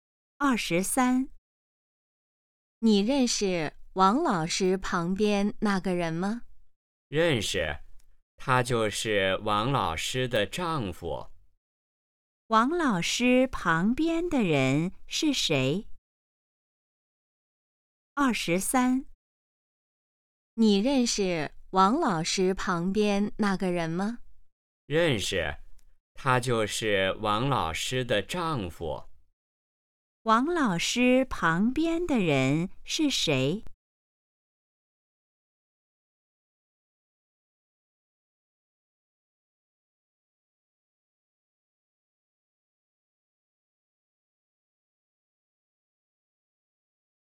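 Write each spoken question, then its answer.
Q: 王老师旁边的人是谁?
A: 王老师的丈夫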